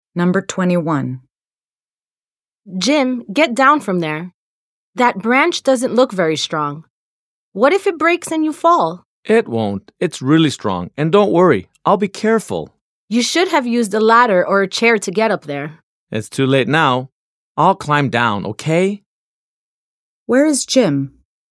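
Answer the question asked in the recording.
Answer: Up in a tree (on a branch)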